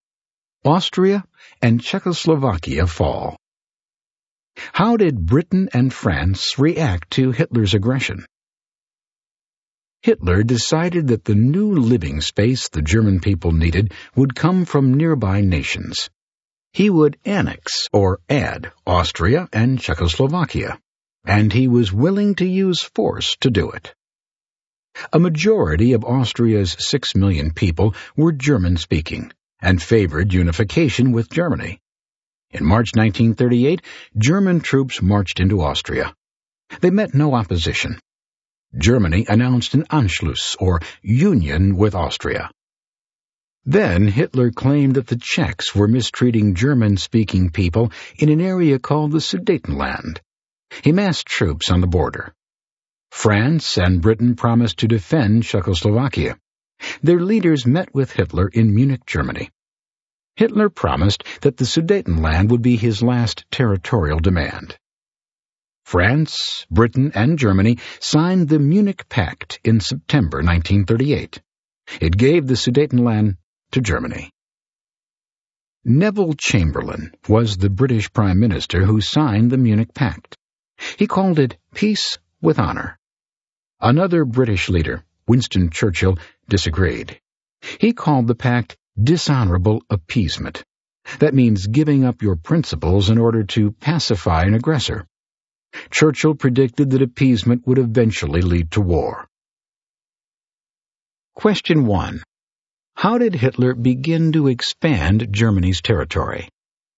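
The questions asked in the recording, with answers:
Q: How did Hitler begin to expand Germany's territory?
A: By annexing Austria and taking the Sudetenland/Czechoslovakia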